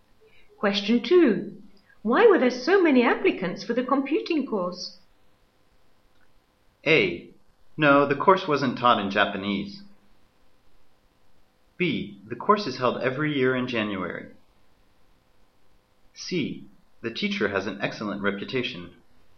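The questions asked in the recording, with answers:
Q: Why were there so many applicants for the computing course?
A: C: The teacher has an excellent reputation.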